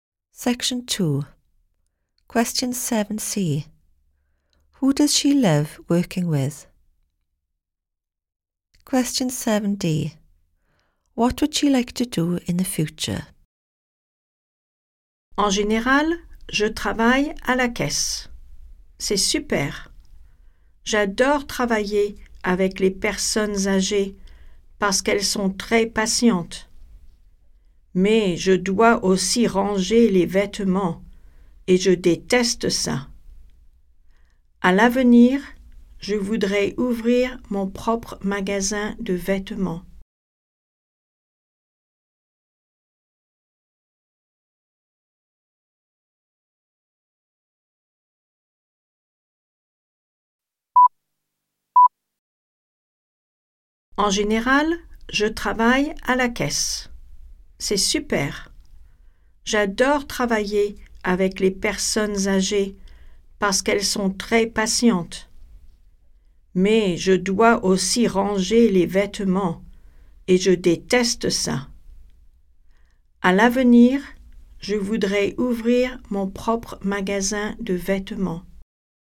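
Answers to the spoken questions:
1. Elderly people
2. Open her own clothes shop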